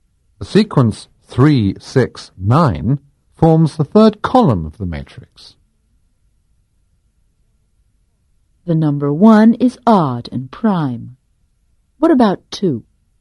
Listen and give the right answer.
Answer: The number 2 is even and prime.